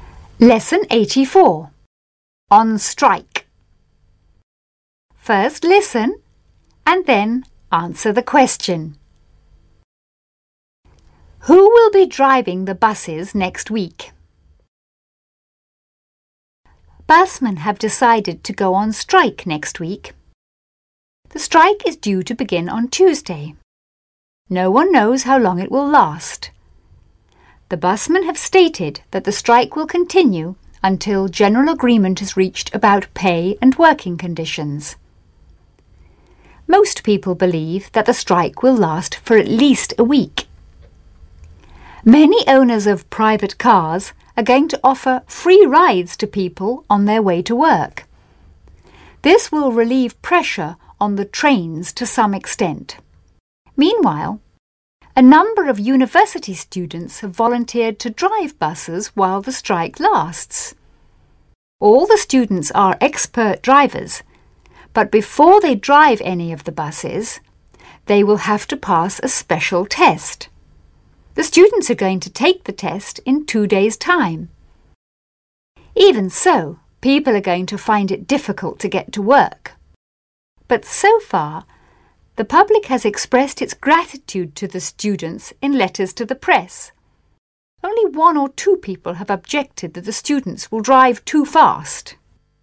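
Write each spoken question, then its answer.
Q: Who will be driving the buses next week?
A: University students who have volunteered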